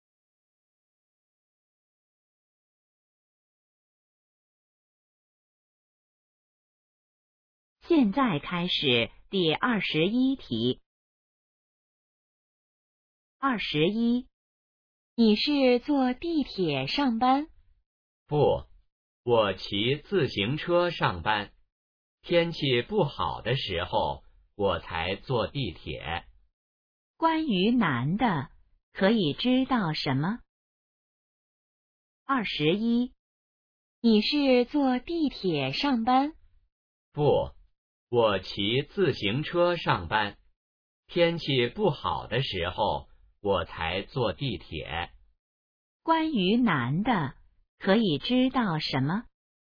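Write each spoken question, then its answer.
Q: 关于男的,可以知道什么?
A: 他一般骑自行车上班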